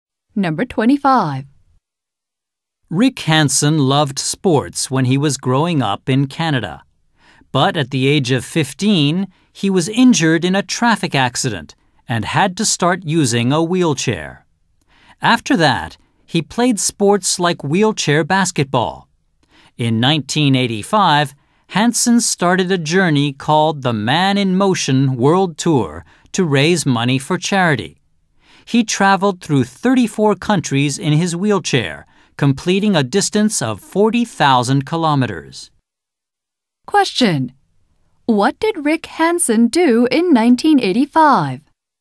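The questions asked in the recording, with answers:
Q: What did Rick Hansen do in 1985?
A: He started the Man in Motion World Tour, traveling through 34 countries in his wheelchair to raise money for charity.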